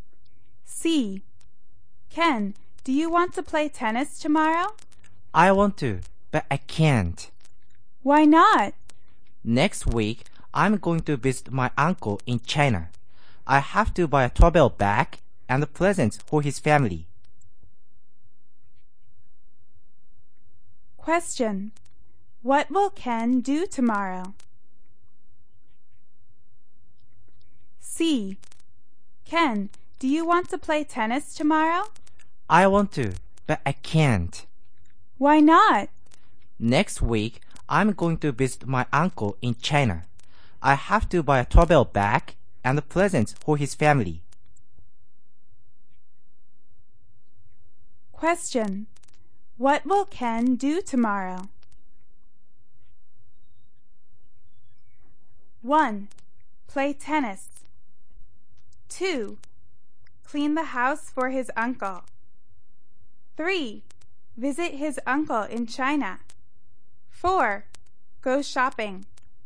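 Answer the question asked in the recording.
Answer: 4: Go shopping.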